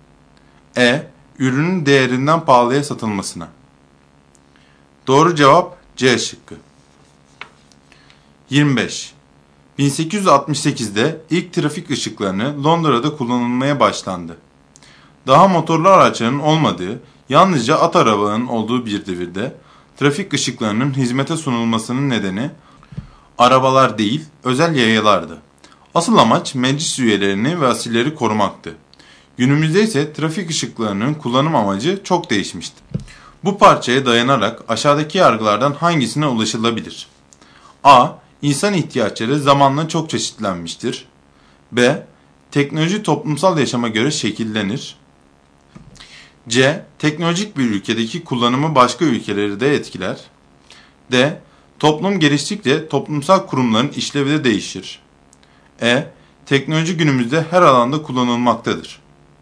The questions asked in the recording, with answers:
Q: Bu parçaya dayanarak aşağıdaki yargılardan hangisine ulaşılabilir?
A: Doğru cevap B şıkkı.